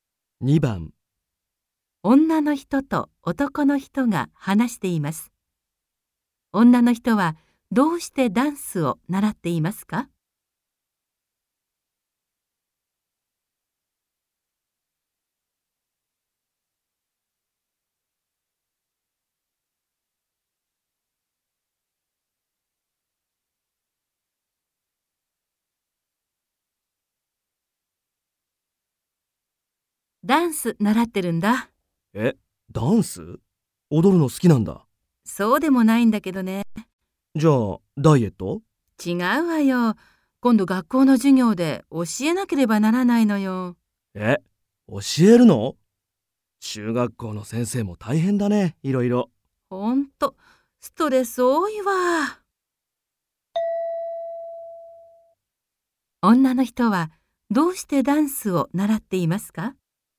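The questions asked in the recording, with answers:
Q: 女の人はどうしてダンスを習っていますか?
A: 学校の授業で教えなければならないから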